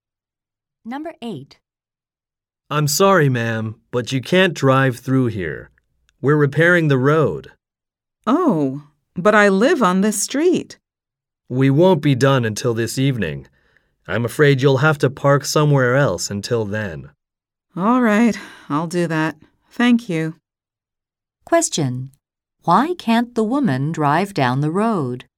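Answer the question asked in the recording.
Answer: The road is being repaired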